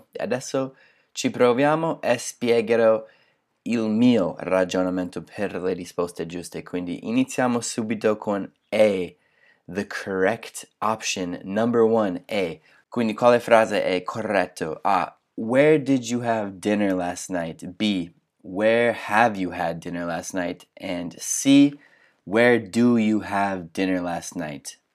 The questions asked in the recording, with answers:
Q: Quindi quale frase è corretto?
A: E in questo caso la risposta è A